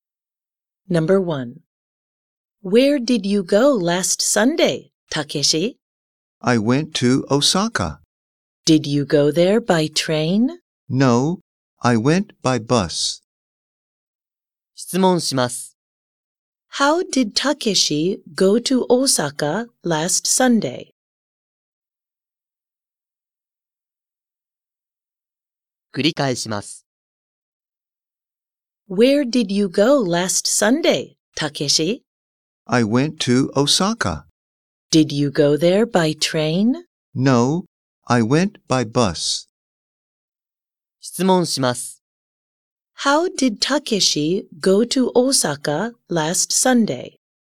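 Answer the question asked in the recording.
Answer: By bus.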